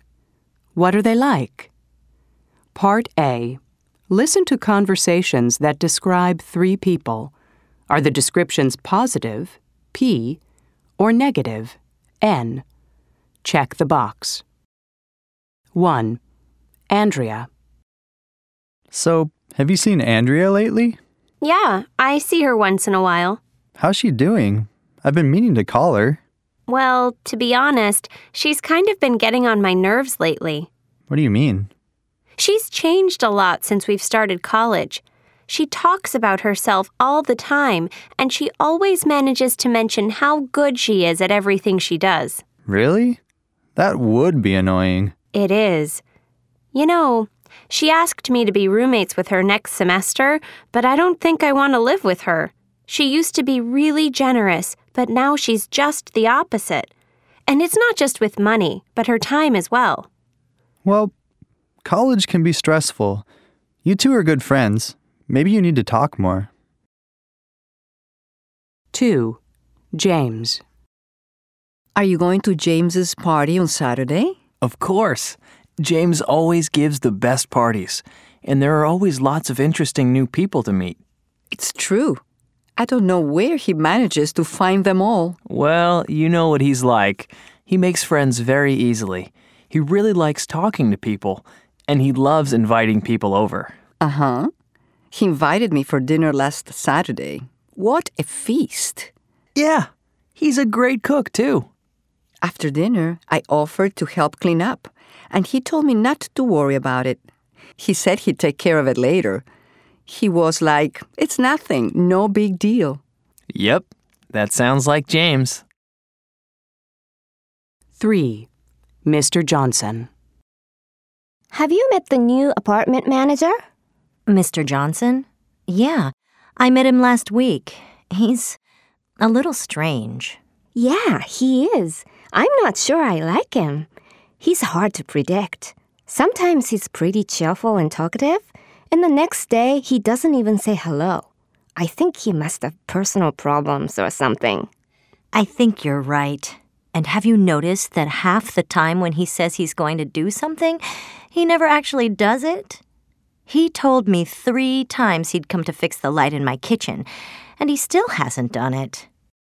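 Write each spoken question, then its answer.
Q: Andrea.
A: N: negative

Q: James.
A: P: positive

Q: Mr. Johnson.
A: N: negative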